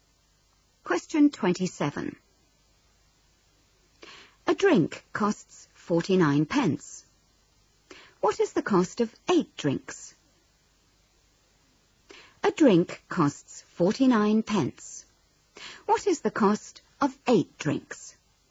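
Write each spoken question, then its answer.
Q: What is the cost of 8 drinks?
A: £3.92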